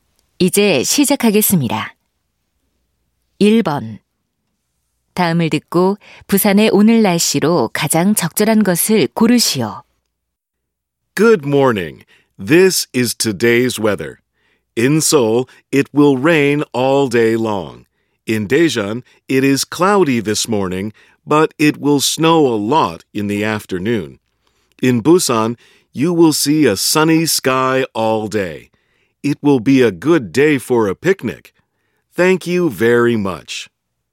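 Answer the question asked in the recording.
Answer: 하루 종일 맑음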